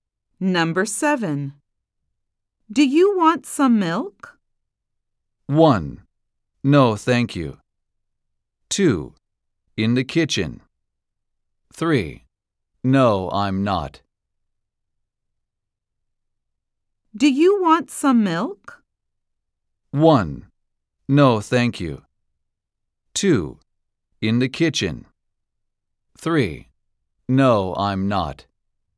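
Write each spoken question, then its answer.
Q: Do you want some milk?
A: 1: No, thank you.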